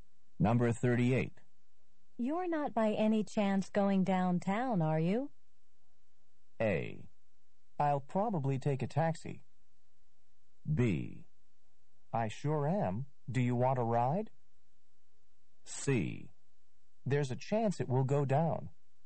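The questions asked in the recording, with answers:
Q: You're not by any chance going downtown, are you?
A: B: I sure am. Do you want a ride?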